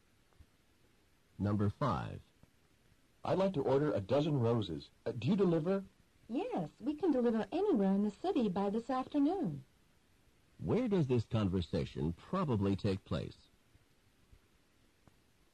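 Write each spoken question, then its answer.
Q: Where does this conversation probably take place?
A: At a flower shop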